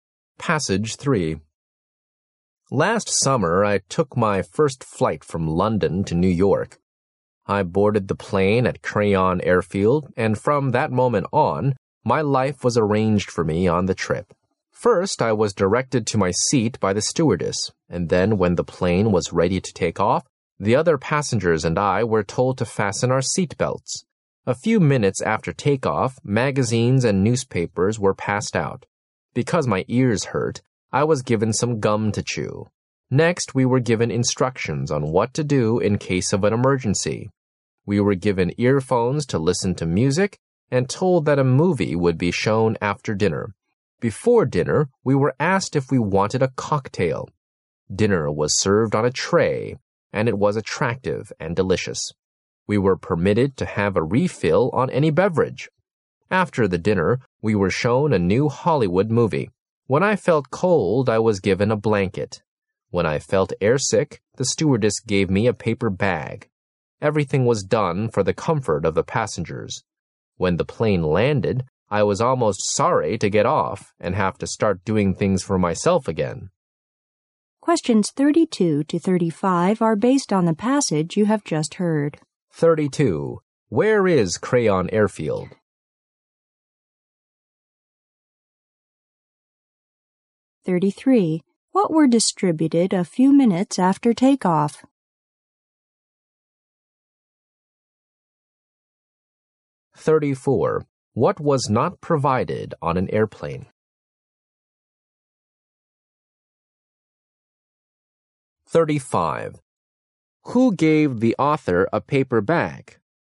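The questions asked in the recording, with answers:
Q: Where is Crayon Airfield?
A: In London

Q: What were distributed a few minutes after takeoff?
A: Magazines and newspapers

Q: Who gave the author a paper bag?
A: The stewardess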